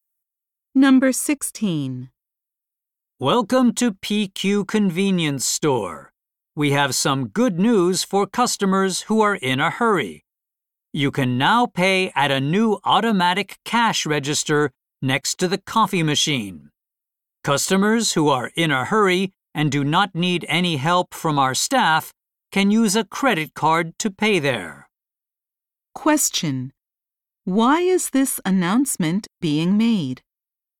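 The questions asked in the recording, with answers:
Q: Why is this announcement being made?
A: To tell customers about a new automatic cash register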